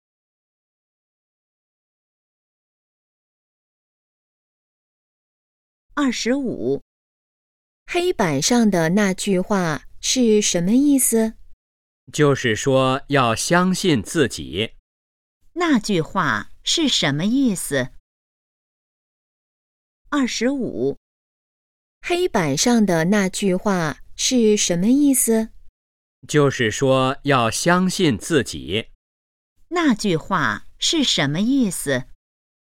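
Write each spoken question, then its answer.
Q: 那句话是什么意思?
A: 要相信自己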